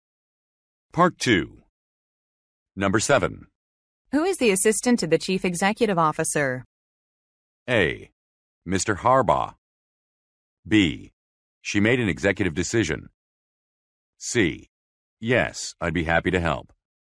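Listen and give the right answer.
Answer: A: Mr. Harbaugh.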